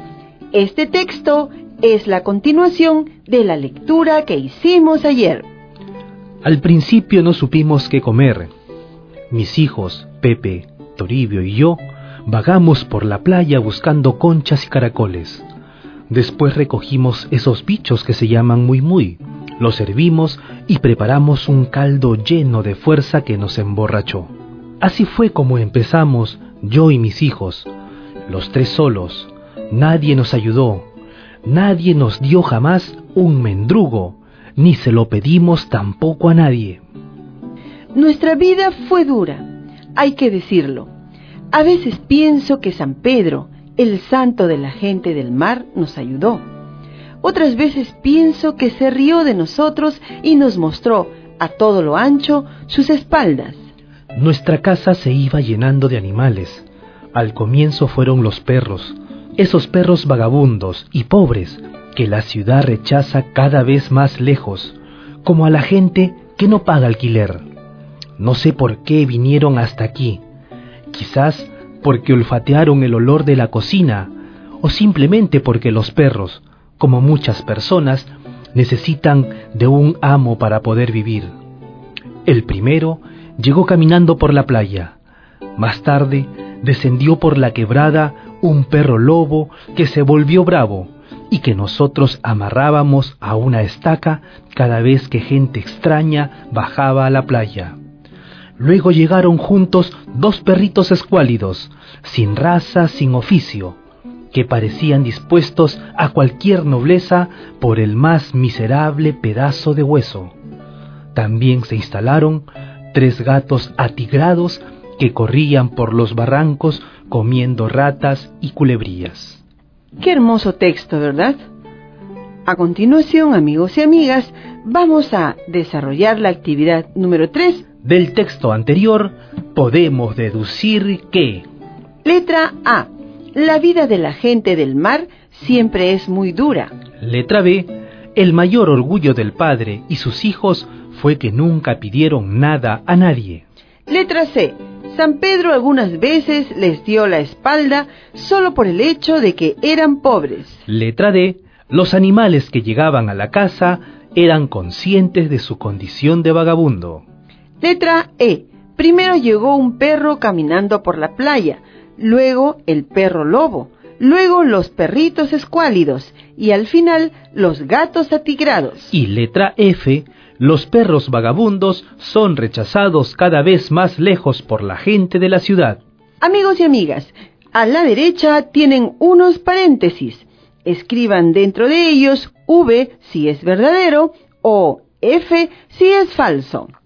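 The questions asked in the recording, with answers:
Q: Letra E. Primero llegó un perro caminando por la playa, luego el perro lobo, luego los perritos escuálidos y al final los gatos atigrados.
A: V (verdadero)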